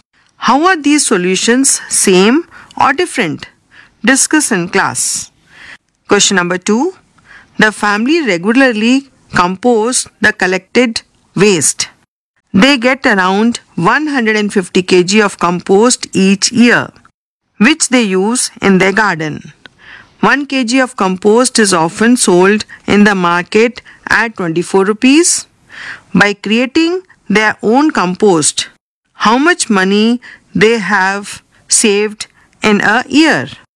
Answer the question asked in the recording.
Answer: On adding these two values, the answer is 3600.